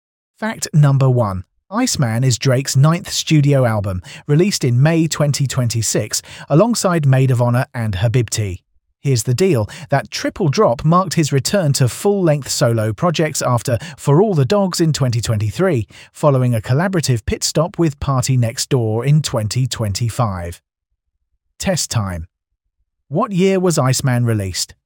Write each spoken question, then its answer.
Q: What year was Iceman released?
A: Correct answer, 2026.